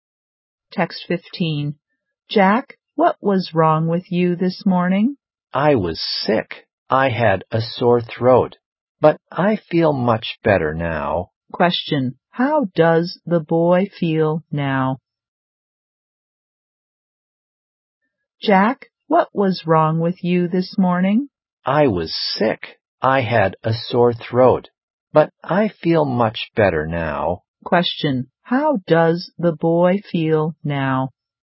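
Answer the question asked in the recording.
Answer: Much better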